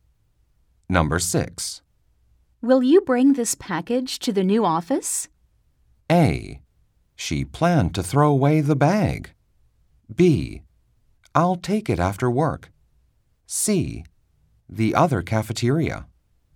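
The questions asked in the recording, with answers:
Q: Will you bring this package to the new office?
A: B: I'll take it after work.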